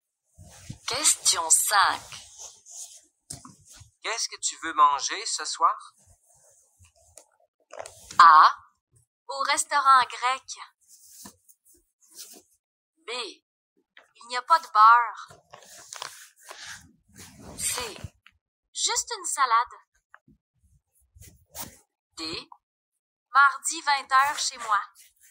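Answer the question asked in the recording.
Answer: C: Juste une salade.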